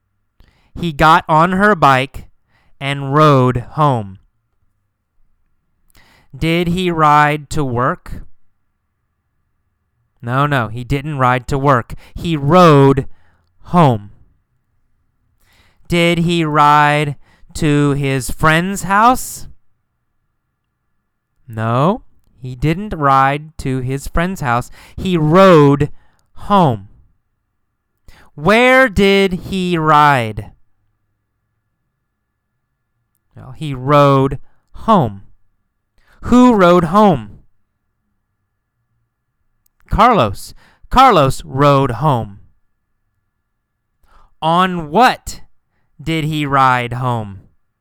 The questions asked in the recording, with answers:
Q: On what did he ride home?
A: On her bike, right? He rode home on her bike.